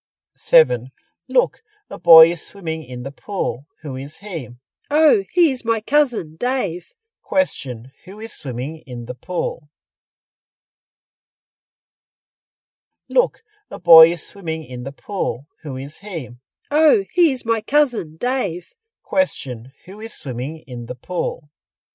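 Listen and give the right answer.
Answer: Dave, the cousin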